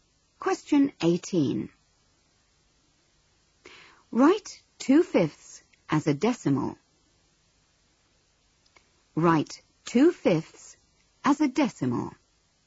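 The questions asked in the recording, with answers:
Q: Write 2/5 as a decimal.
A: 0.4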